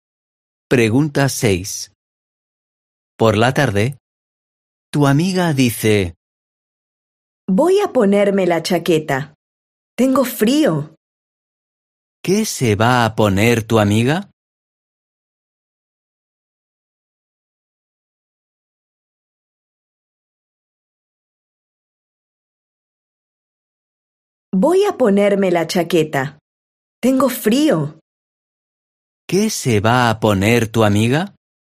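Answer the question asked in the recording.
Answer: la chaqueta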